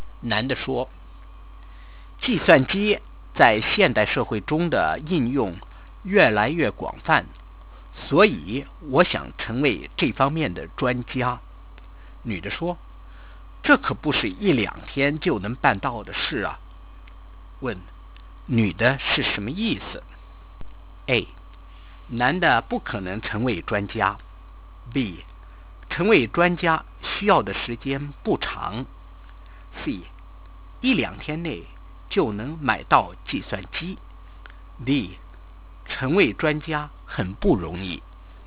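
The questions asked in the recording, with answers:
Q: 问,女的是什么意思?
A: D: 成为专家很不容易。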